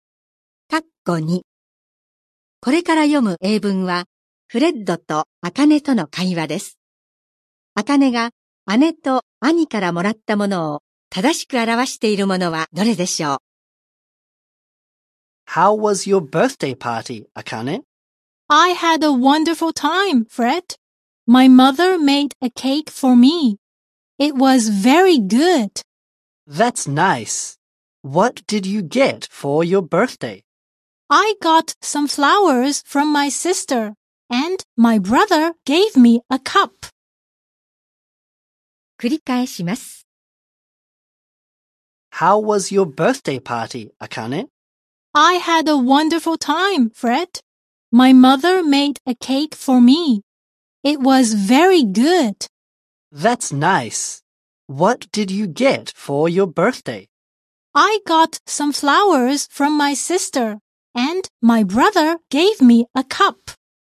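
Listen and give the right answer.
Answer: 姉から花、兄からカップ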